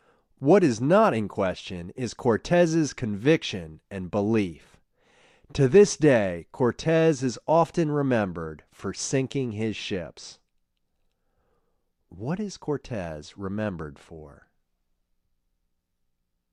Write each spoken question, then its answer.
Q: What is Cortez remembered for?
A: He is remembered for sinking his ships.